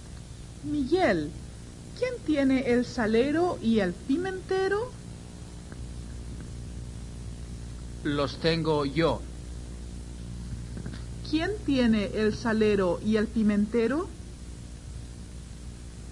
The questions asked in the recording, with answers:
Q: ¿Quién tiene el salero y el pimentero?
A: Los tiene Miguel.